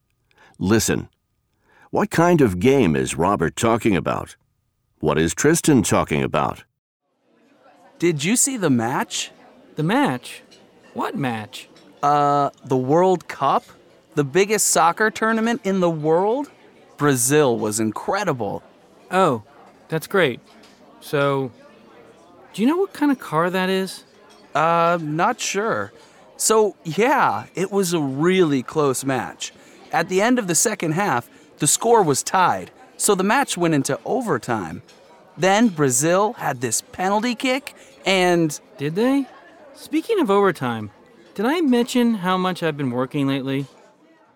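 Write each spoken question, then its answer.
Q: What kind of game is Robert talking about?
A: A soccer match (the World Cup)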